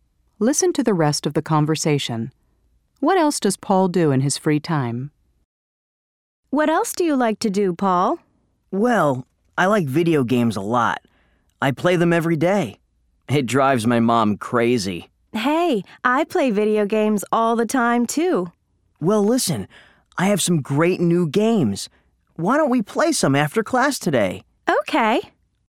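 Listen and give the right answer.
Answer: He plays video games (every day).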